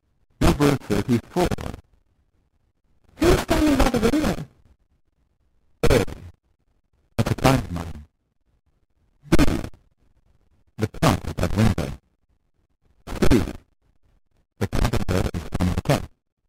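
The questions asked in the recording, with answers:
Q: Who's standing by the window?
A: A: That's a client of mine.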